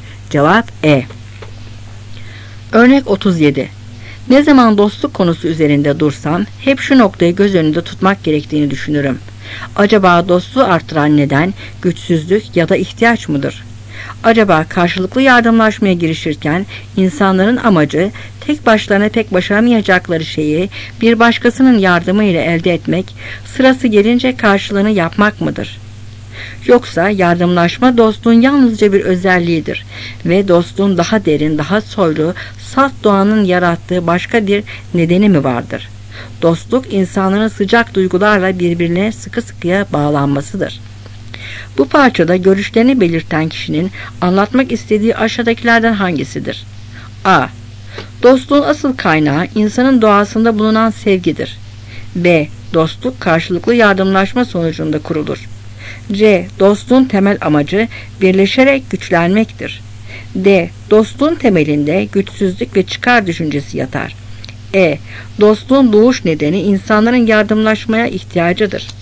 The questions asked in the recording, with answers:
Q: Bu parçada görüşlerini belirten kişinin anlatmak istediği aşağıdakilerden hangisidir?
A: Cevap A.